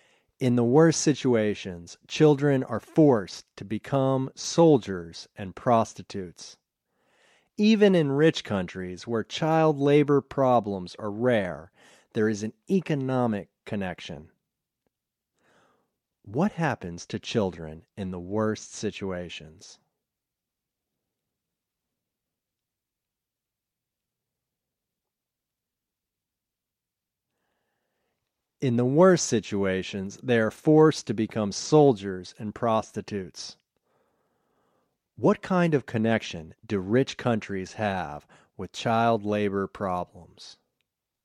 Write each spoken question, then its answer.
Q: What happens to children in the worst situations?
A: In the worst situations, they are forced to become soldiers and prostitutes.

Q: What kind of connection do rich countries have with child labor problems?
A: Rich countries have an economic connection with child labor problems.